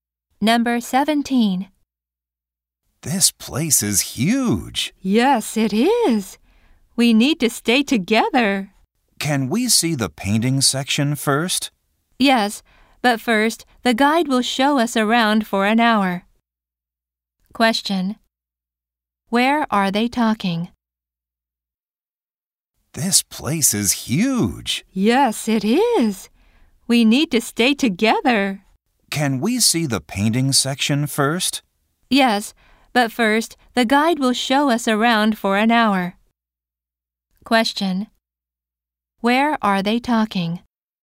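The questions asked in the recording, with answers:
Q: Where are they talking?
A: At a museum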